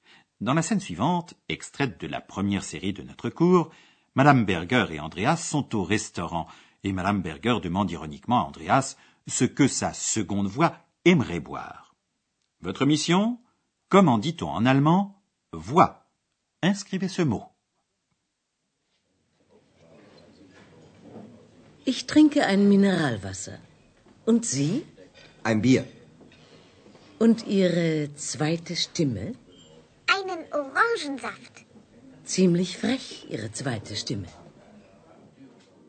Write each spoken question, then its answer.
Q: Votre mission Comment dit-on en allemand Voix.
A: Ce mot est Stimme